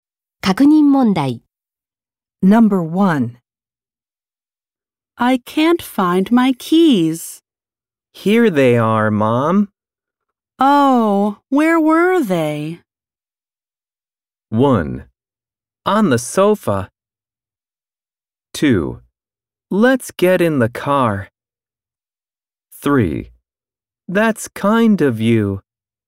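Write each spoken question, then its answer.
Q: Oh, where were they?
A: 1: On the sofa.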